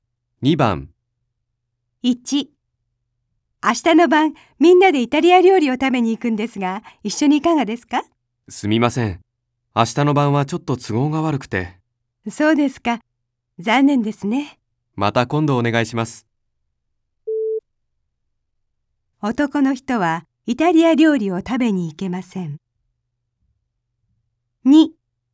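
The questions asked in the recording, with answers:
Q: 男の人はイタリア料理を食べに行けません。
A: ○(正しい)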